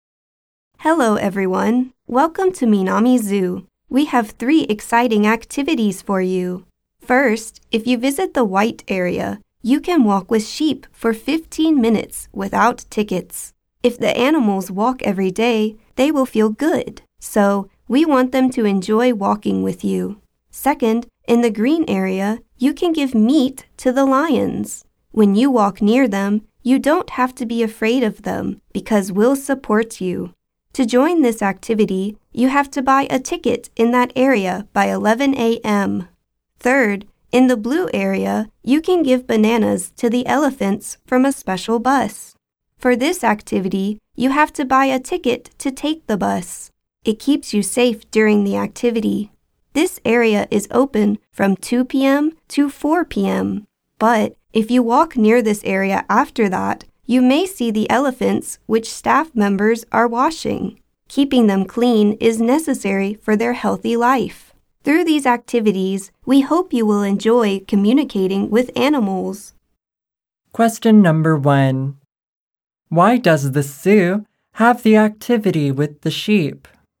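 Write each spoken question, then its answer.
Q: Why does the zoo have the activity with the sheep?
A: Because walking every day makes the animals feel good.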